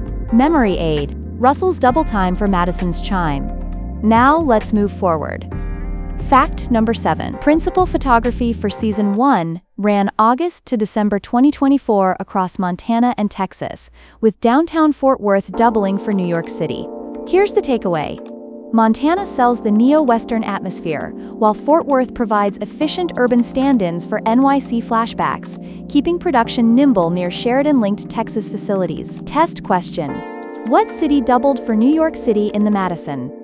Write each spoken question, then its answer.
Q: Test question: what city doubled for New York City in The Madison?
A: Fort Worth.